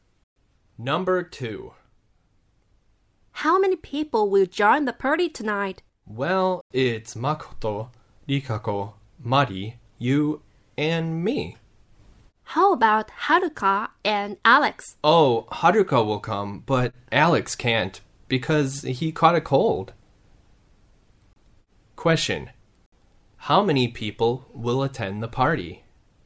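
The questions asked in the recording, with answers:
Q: How many people will attend the party?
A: Six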